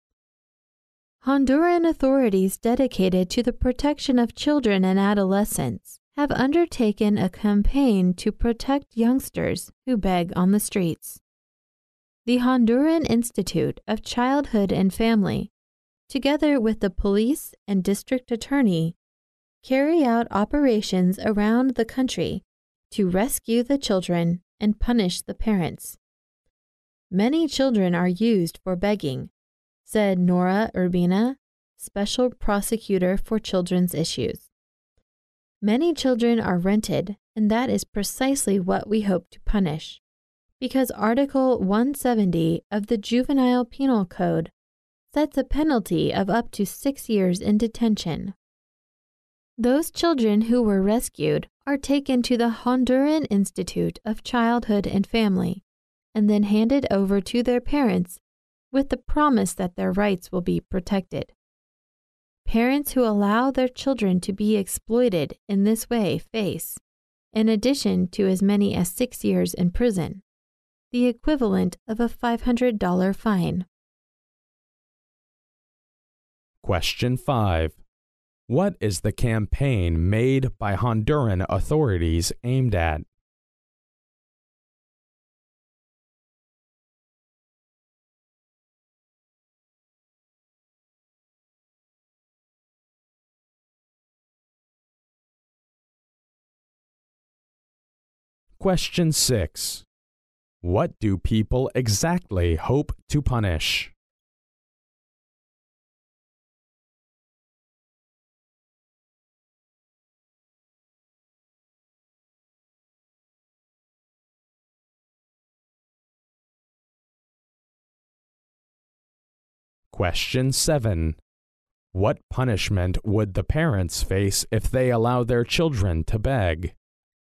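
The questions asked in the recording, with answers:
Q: What is the campaign made by Honduran authorities aimed at?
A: Protecting children who beg on the streets

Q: What do people exactly hope to punish?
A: The renting of children for begging

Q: What punishment would the parents face if they allow their children to beg?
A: Up to 6 years in prison and a fine equivalent to $500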